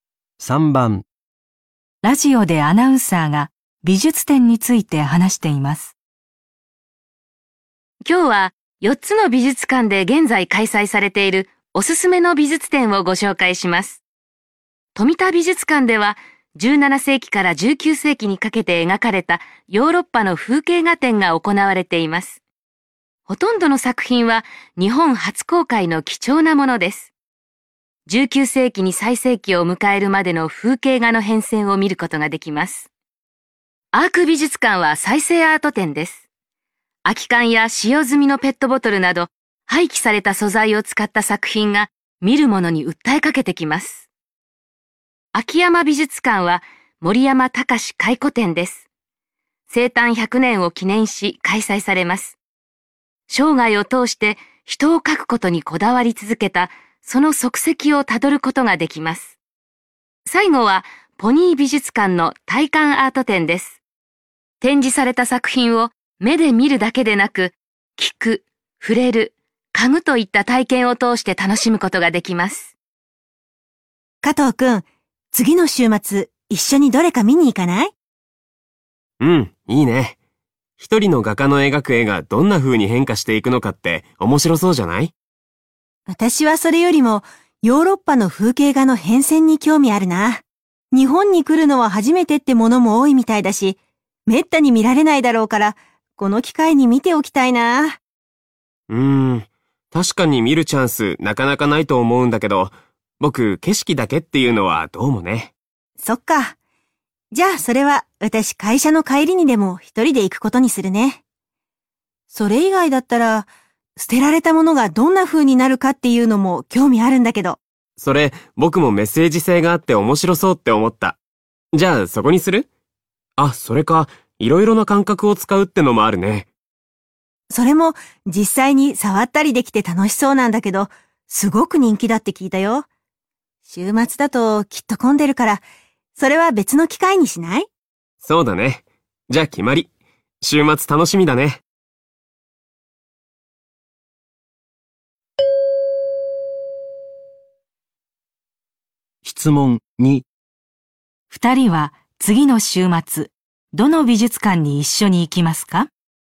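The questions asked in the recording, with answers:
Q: 質問2二人は次の週末、どの美術館に一緒に行きますか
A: アーク美術館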